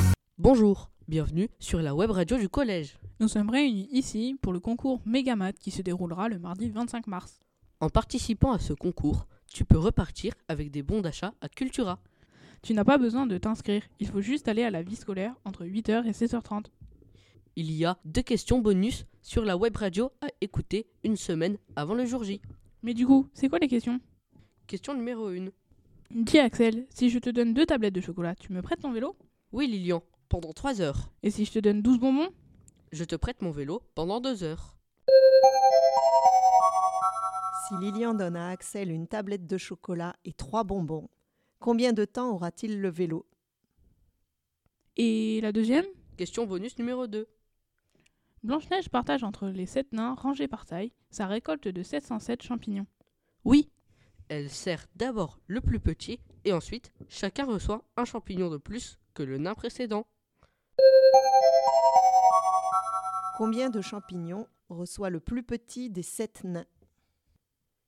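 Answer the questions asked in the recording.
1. 2 heures
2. 98 champignons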